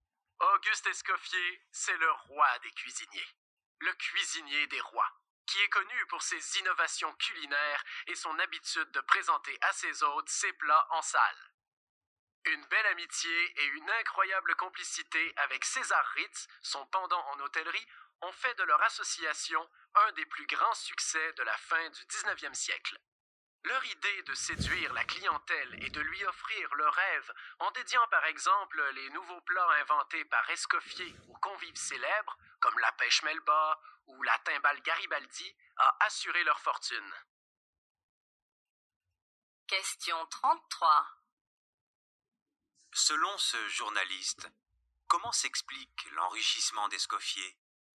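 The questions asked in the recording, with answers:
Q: Selon ce journaliste, comment s'explique l'enrichissement d'Escoffier ?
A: Il a séduit la clientèle en dédiant ses nouveaux plats à des convives célèbres, en association avec César Ritz.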